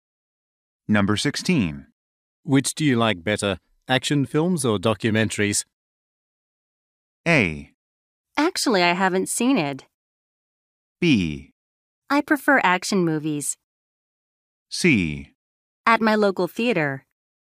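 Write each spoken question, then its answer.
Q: Which do you like better, action films or documentaries?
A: B: I prefer action movies.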